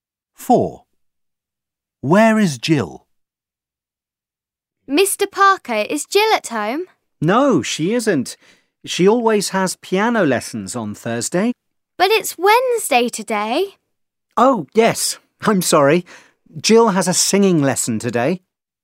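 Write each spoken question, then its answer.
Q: Where is Jill?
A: At her singing lesson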